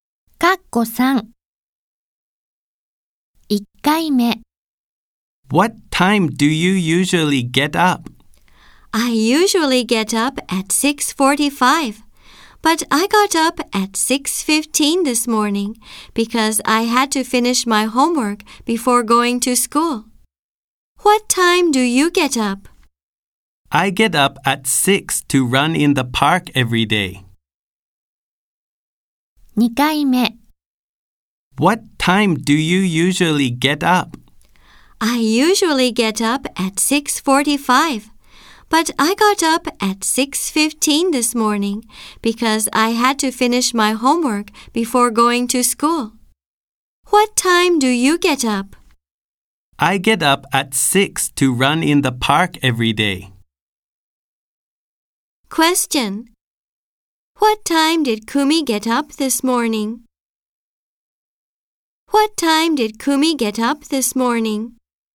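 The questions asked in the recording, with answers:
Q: What time did Kumi get up this morning?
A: At 6:15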